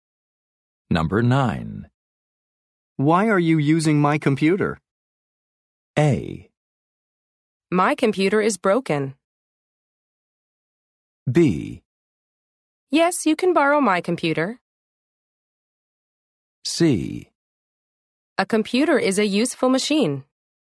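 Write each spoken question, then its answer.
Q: Why are you using my computer?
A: A: My computer is broken.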